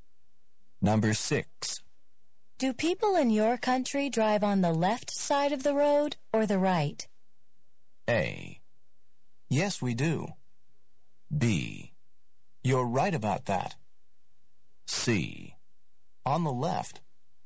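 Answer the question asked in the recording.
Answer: C: On the left.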